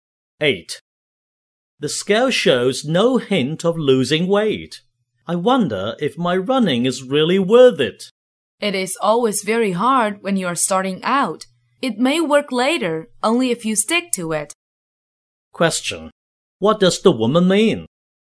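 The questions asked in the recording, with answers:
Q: What does the woman mean?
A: He should keep running and it will work later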